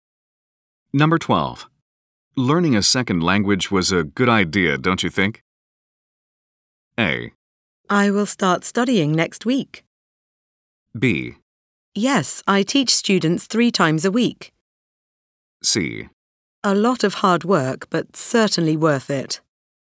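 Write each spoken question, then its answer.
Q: Learning a second language was a good idea, don't you think?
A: C: A lot of hard work, but certainly worth it.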